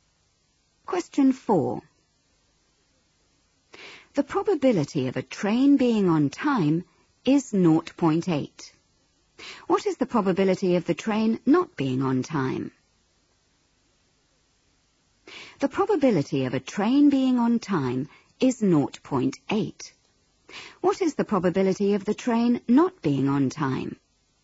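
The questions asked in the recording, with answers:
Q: What is the probability of the train not being on time?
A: 0.2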